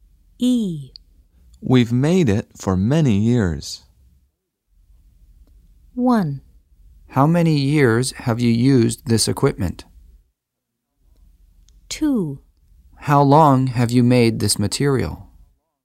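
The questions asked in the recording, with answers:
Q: We've made it for many years.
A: 2: How long have you made this material?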